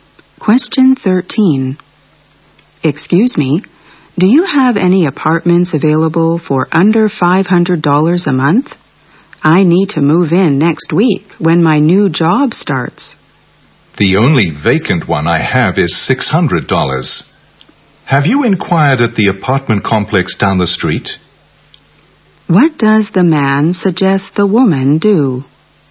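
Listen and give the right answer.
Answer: Ask at the apartment complex down the street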